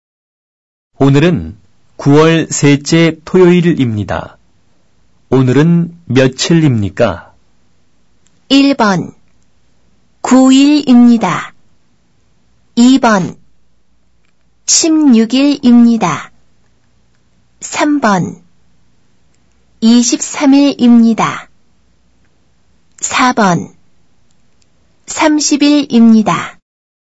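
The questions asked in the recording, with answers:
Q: 오늘은 며칠입니까?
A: 2: 16일입니다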